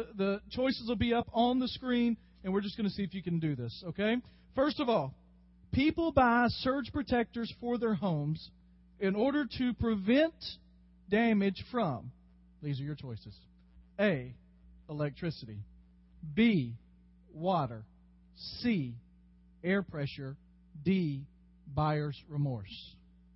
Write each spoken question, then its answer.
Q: people buy surge protectors for their homes in order to prevent damage from, these are your choices, A, electricity, B, water, C, air pressure, D, buyer's remorse.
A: His final answer is electricity, and the answer is electricity.